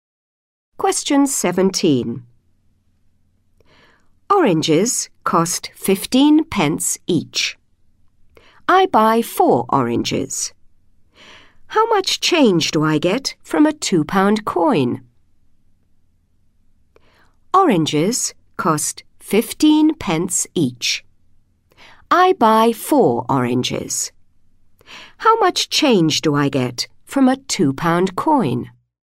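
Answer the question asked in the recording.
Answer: £1.40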